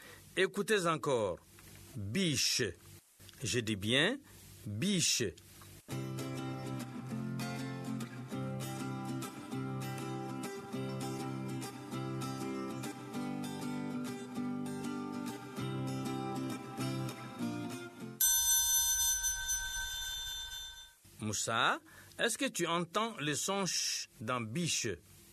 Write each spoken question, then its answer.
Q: Moussa, est-ce que tu entends le son ch dans biche?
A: Oui, monsieur. Dans biche, il y a le son ch.